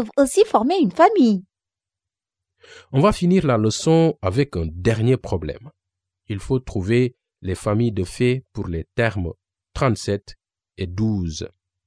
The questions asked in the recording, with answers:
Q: Il faut trouver les familles de fées pour les termes 37 et 12.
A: Les membres des fées de l'addition pour 37 et 12 sont 37 plus 12 égale 49 et 12 plus 37 égale 49.